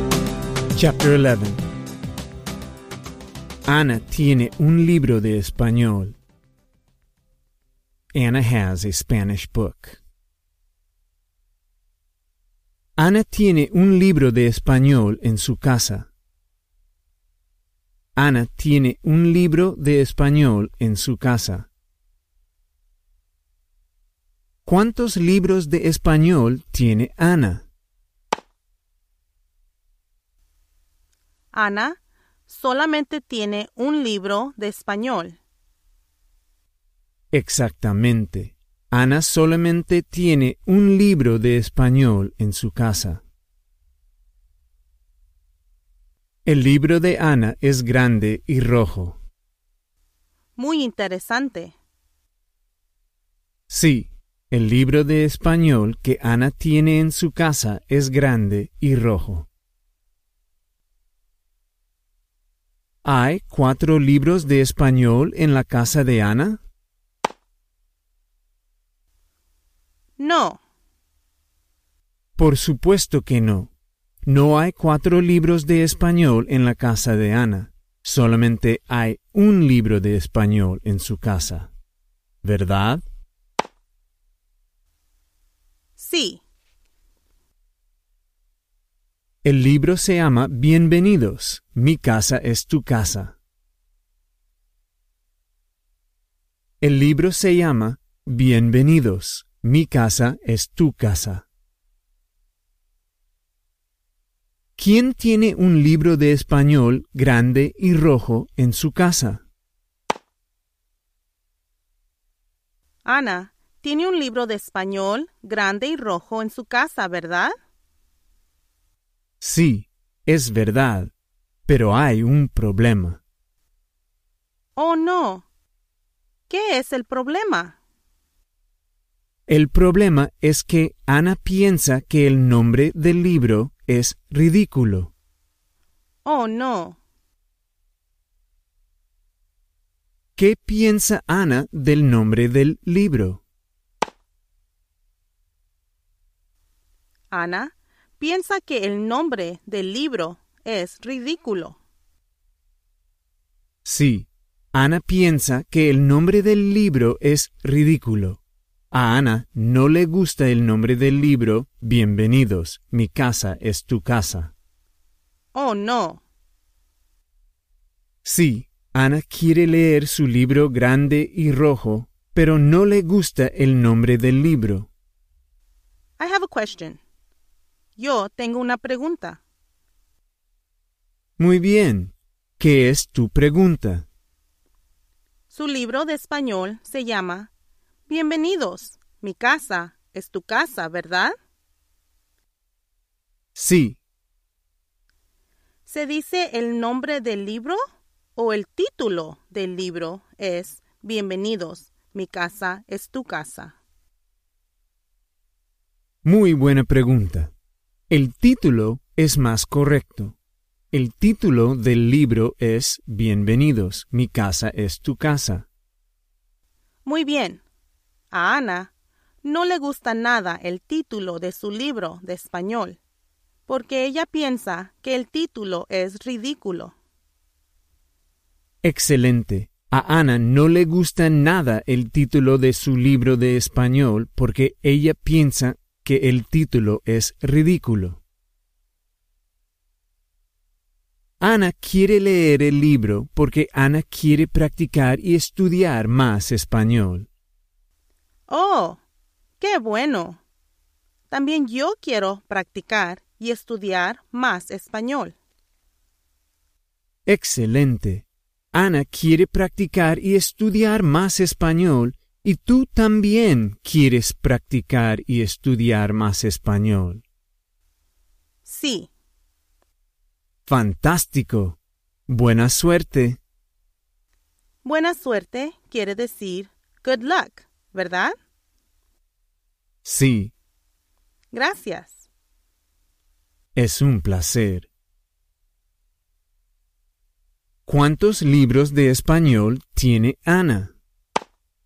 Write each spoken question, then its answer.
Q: ¿Cuántos libros de español tiene Ana?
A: Ana solamente tiene un libro de español.